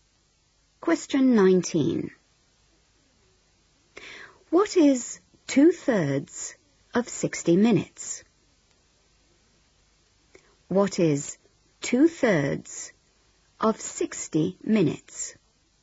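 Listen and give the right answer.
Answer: 40 minutes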